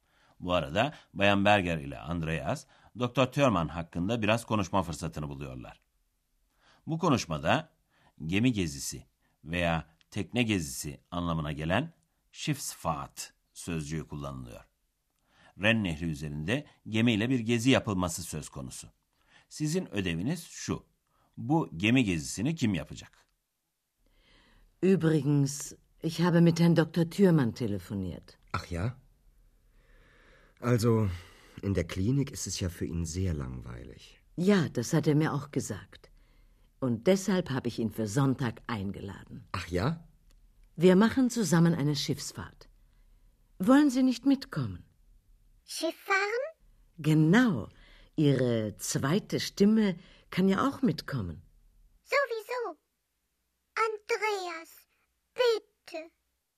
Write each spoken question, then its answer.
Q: Bu gemi gezisini kim yapacak?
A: Bayan Berger, Doktor Thürmann'ı Ren Nehri'nde gemiyle yapılacak bir geziye davet etmiş.